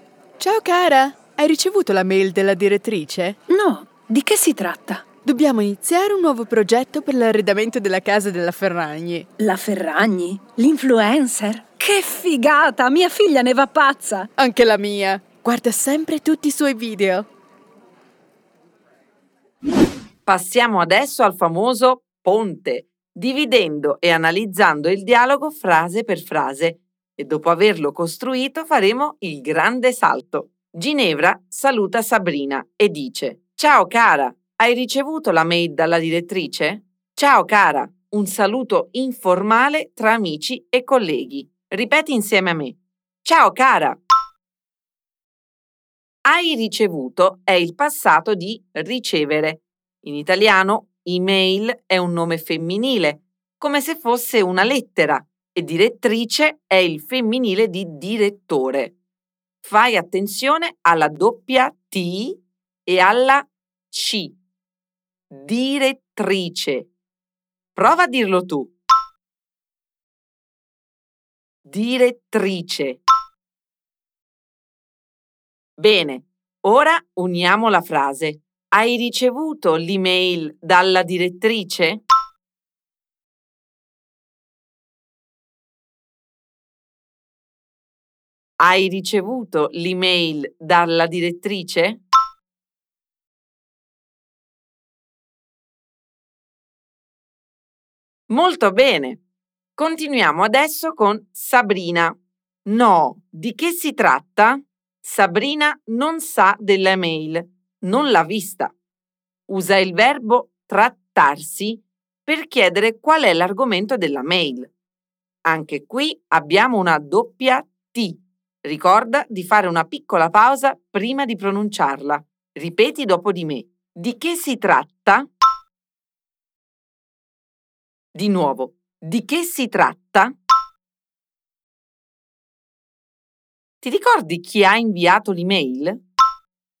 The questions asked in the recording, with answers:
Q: Ti ricordi chi ha inviato l'email?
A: La direttrice,